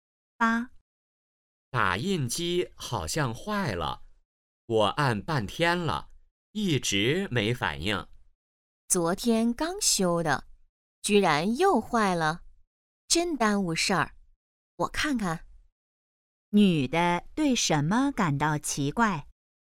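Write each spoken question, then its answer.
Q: 女的对什么感到奇怪?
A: 打印机昨天刚修又坏了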